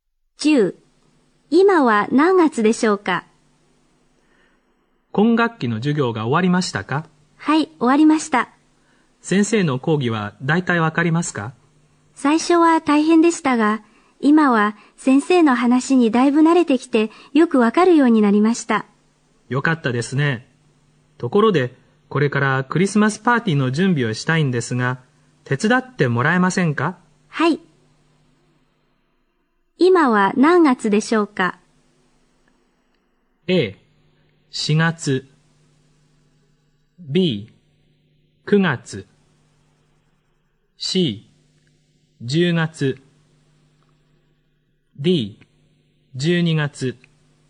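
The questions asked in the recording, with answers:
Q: 今は何月でしょうか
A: D: 12月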